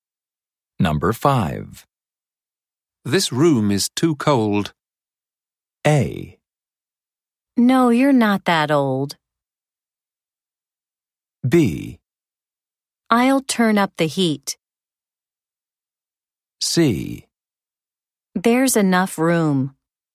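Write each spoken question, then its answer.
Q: This room is too cold.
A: B: I'll turn up the heat.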